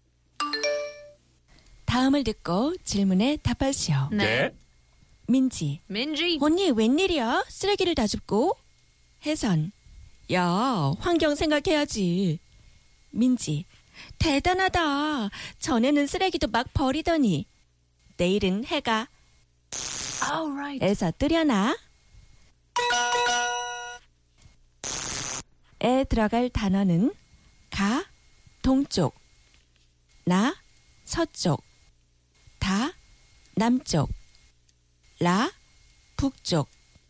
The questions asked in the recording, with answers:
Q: 에 들어갈 단어는 가, 동쪽. 나, 서쪽. 다, 남쪽. 라, 북쪽.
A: Na, 서쪽, west.